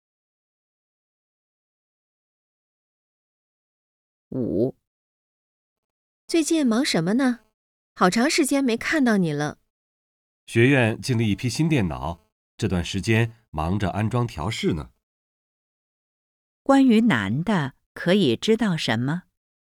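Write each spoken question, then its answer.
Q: 关于男的,可以知道什么?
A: 他最近忙着安装调试新电脑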